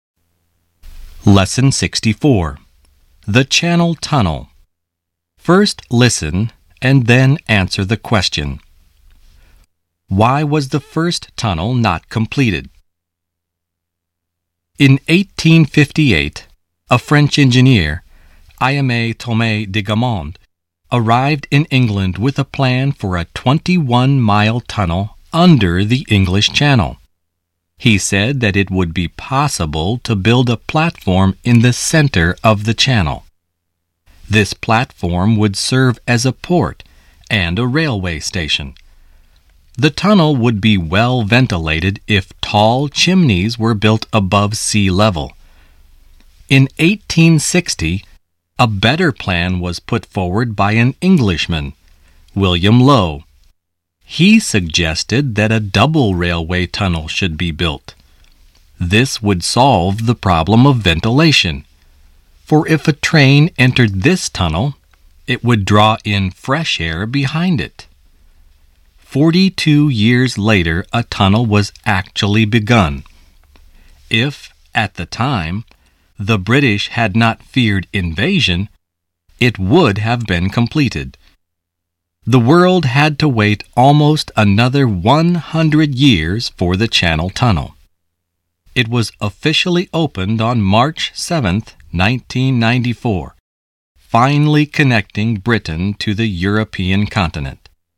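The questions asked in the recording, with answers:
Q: Why was the first tunnel not completed?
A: Because the British feared invasion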